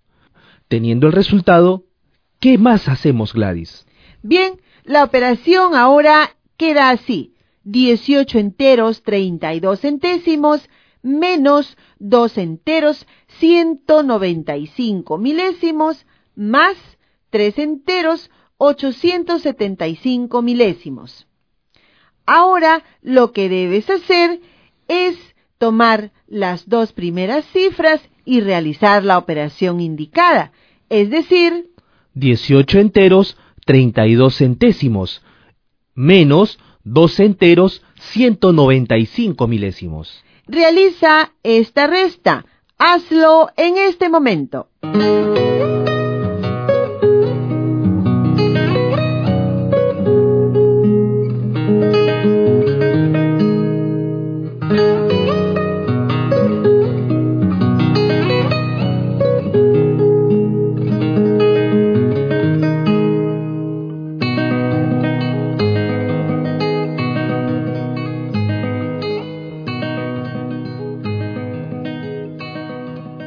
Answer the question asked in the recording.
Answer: El resultado de la operación es 16 enteros 125 milésimos.